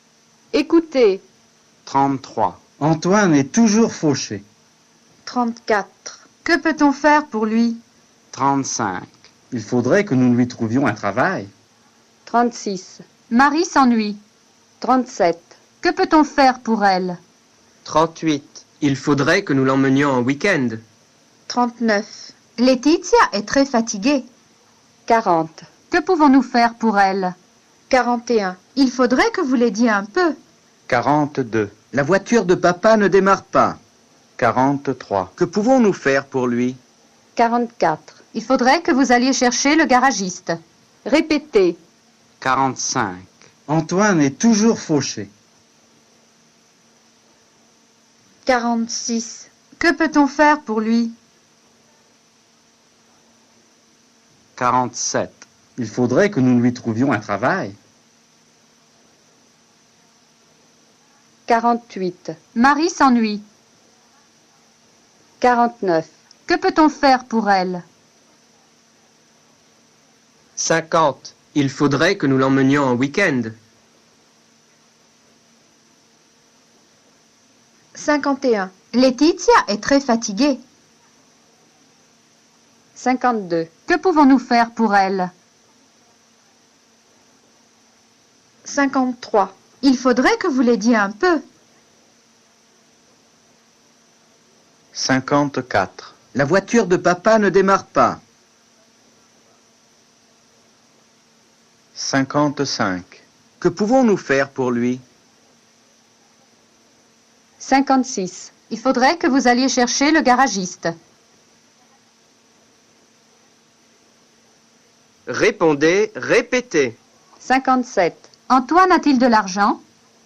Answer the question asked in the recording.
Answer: Non, il est toujours fauché.